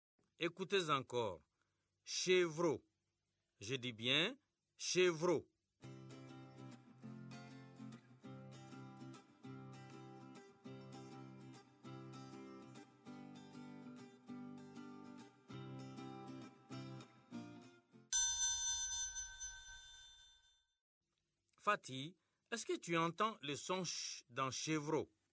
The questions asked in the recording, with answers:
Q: Fatih, est-ce que tu entends le son ch dans chevreau?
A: Oui, monsieur. Dans chevreau, il y a le son ch.